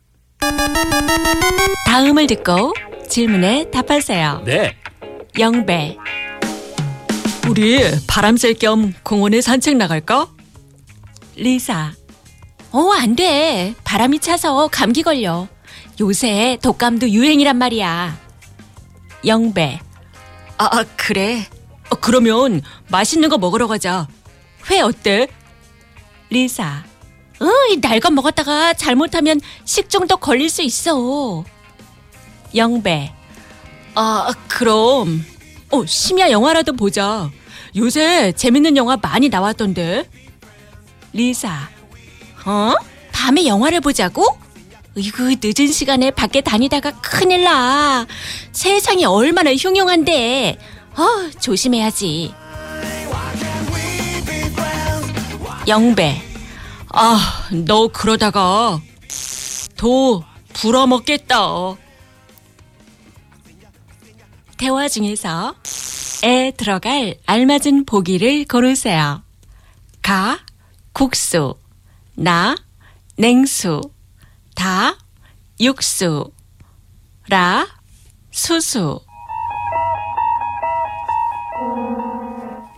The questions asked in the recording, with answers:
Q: 대화 중에서 에 들어갈 알맞은 보기를 고르세요.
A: Na, nengsu, cold water.